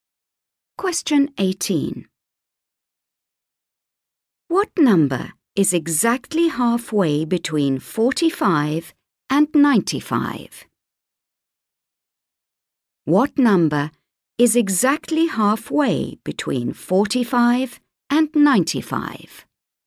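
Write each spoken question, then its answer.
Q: What number is exactly halfway between 45 and 95?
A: 70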